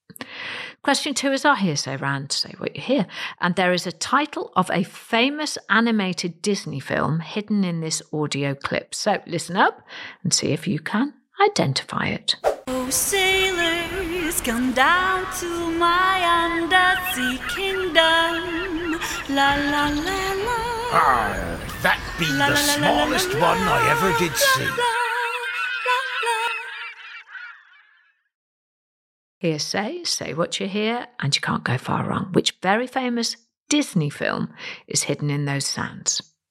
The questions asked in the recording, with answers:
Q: Which very famous Disney film is hidden in those sands?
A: And the answer is The Little Mermaid.